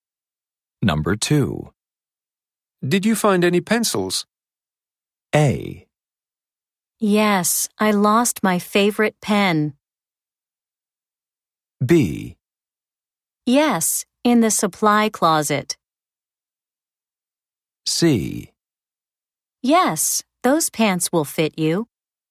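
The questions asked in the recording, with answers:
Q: Did you find any pencils?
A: B: Yes, in the supply closet.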